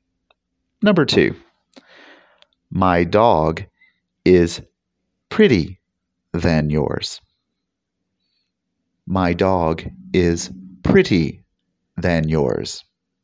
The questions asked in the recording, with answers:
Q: My dog is pretty than yours.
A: Did you say prettier?